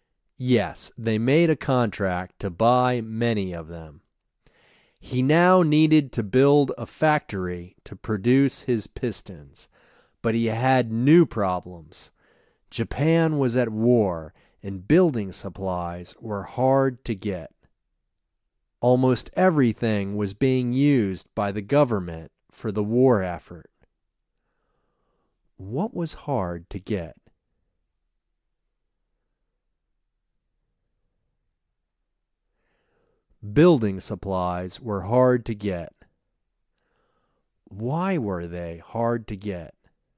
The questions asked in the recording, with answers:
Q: What was hard to get?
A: Building supplies were hard to get.

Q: Why were they hard to get?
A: They were hard to get because almost everything was being used by the government.